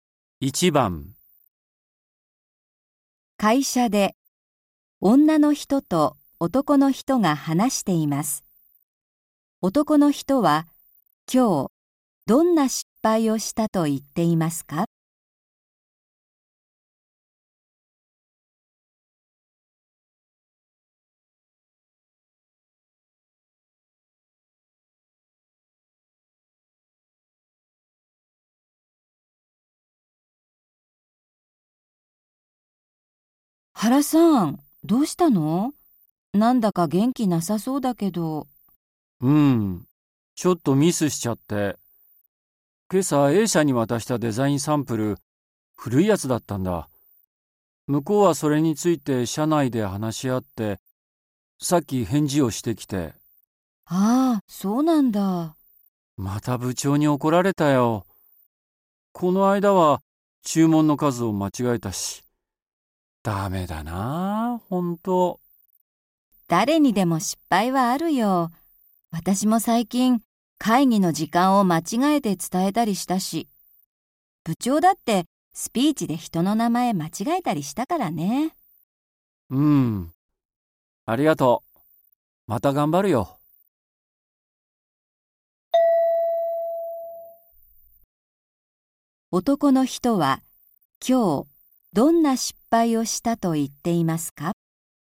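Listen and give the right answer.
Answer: A社に古いデザインサンプルを渡した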